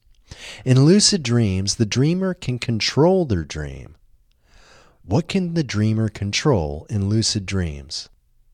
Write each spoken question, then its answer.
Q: What can the dreamer control in lucid dreams?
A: The dreamer can control their dream in lucid dreams.